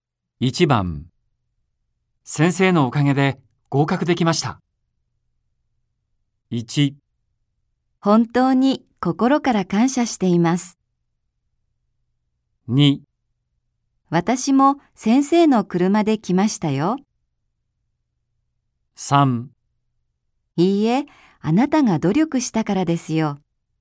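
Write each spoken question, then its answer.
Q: 先生のおかげで合格できました。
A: 3: いいえ、あなたが努力したからですよ。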